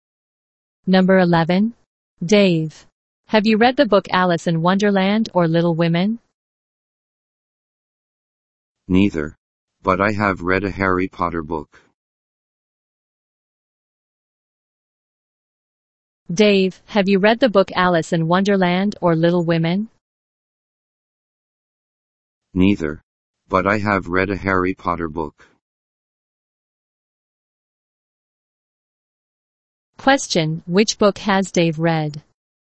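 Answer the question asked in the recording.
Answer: A Harry Potter book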